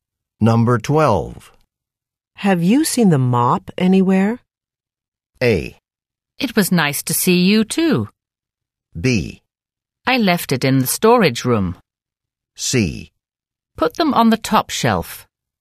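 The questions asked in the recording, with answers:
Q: Have you seen the mop anywhere?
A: B: I left it in the storage room.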